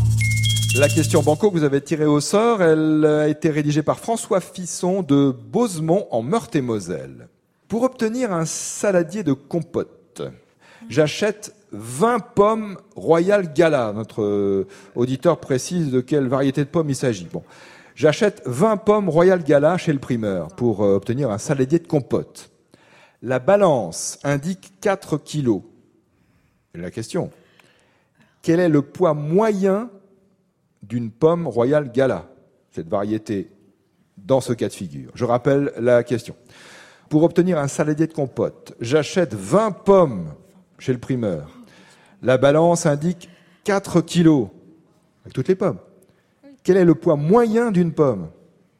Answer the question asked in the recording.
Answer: 4000 divisé par 20 égale 200 grammes.